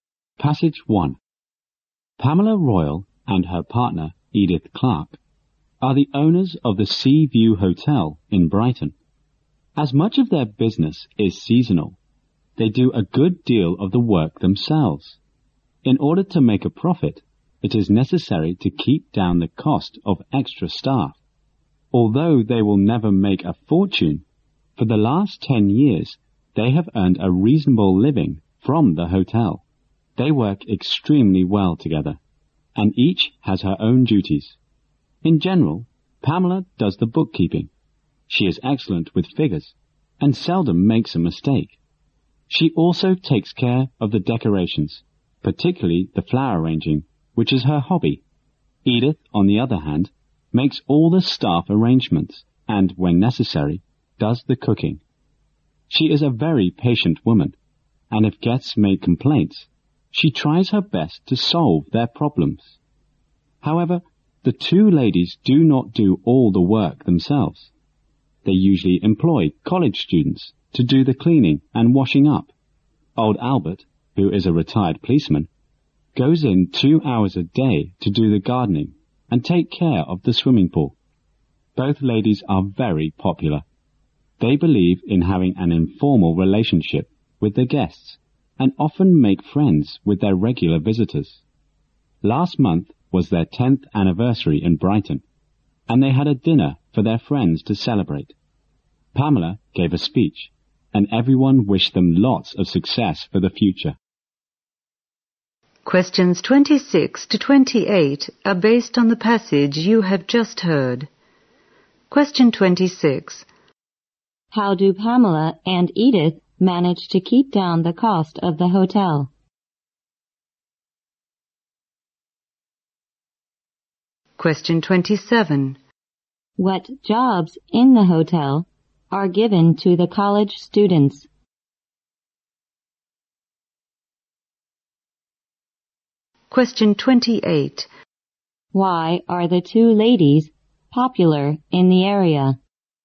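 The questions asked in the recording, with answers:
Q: How do Pamela and Edith manage to keep down the cost of the hotel?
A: They do much of the work themselves

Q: What jobs in the hotel are given to the college students?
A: Cleaning and washing up

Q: Why are the two ladies popular in the area?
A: They have informal, friendly relationships with guests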